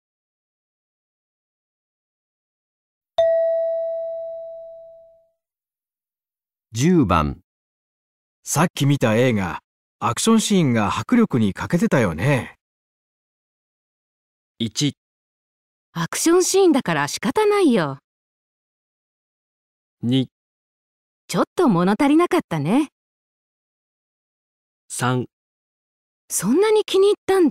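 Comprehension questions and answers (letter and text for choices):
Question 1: メイさっき見た映画、アクションシーンが迫力に欠けてたよね。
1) アクションシーンだから仕方ないよ。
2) ちょっと物足りなかったね。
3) そんなに気にいったんだ?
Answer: 2) ちょっと物足りなかったね。

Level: 【N1 第1回】聴解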